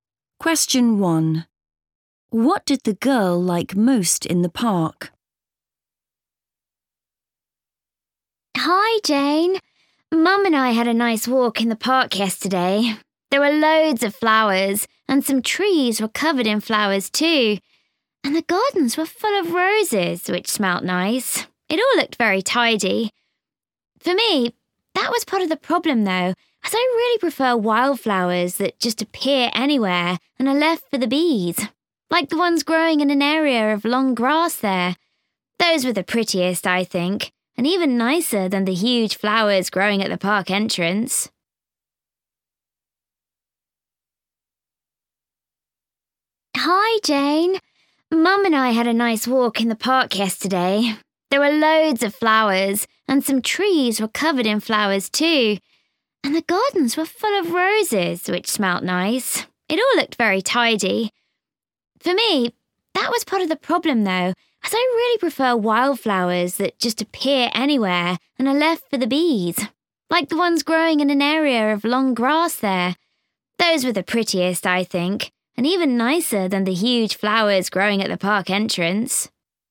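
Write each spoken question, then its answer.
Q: What did the girl like most in the park?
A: the wildflowers in the long grass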